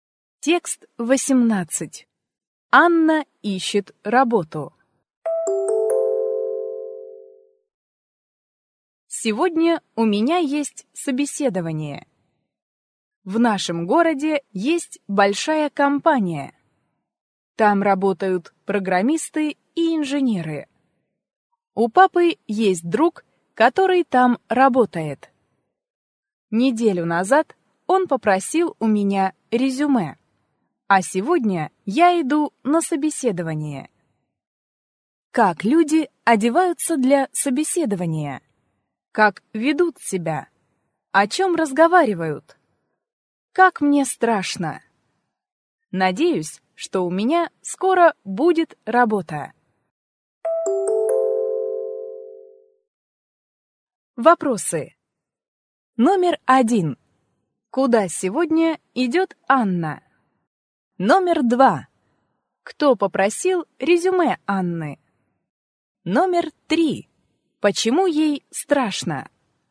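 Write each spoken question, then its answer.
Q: Куда сегодня идет Анна?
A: На собеседование

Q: Кто попросил резюме Анны?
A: Друг папы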